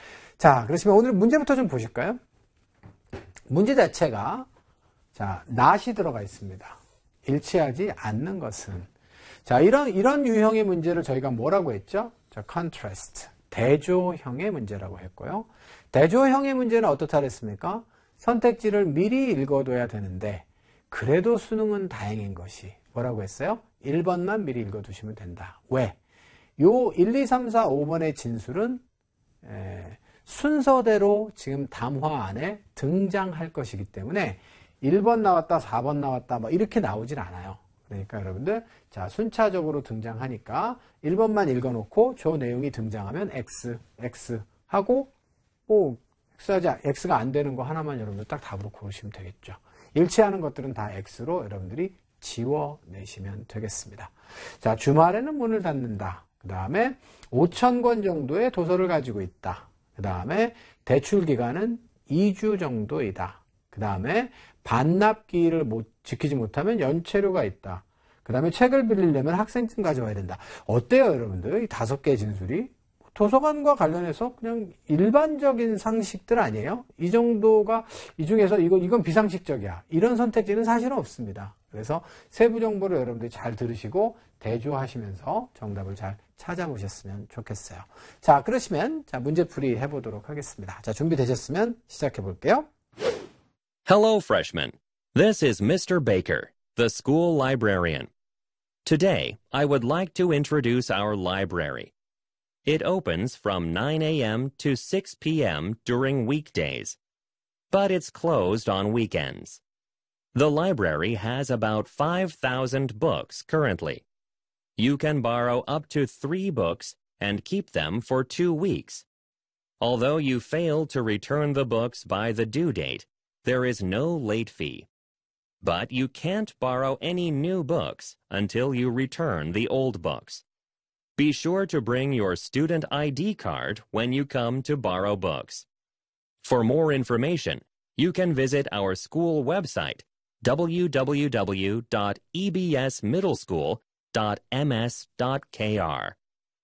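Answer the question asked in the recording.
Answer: 4: 반납기를 지키지 못하면 연체료가 있다.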